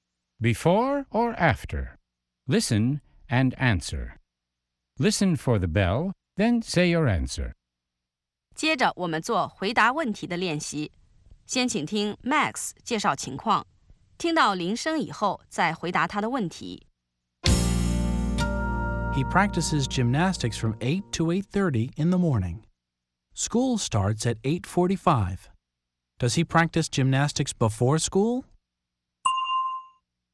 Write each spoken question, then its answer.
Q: Does he practice gymnastics before school?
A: Yes, he does. He practices gymnastics before school.